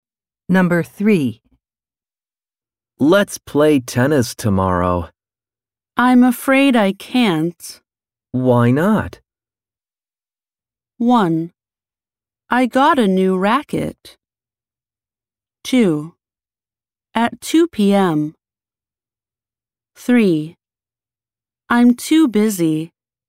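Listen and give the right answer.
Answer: 3: I'm too busy.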